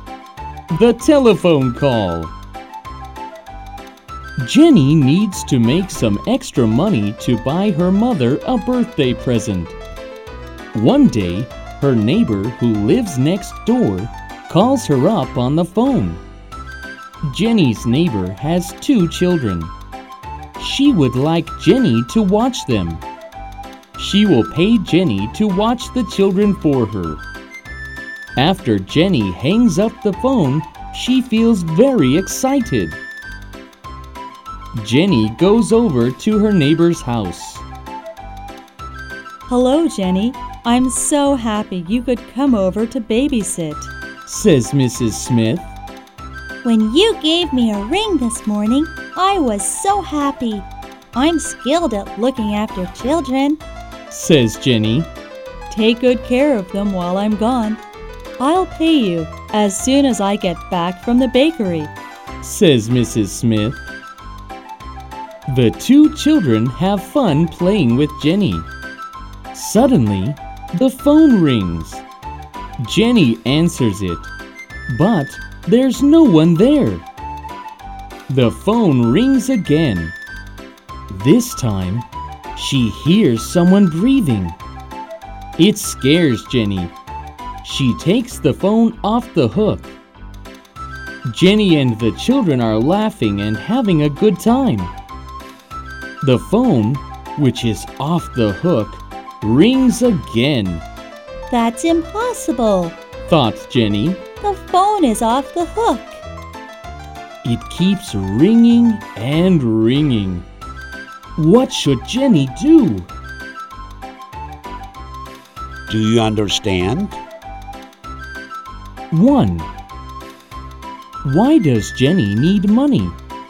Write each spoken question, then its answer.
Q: Why does Jenny need money?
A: Because she wants to buy her mother a birthday present.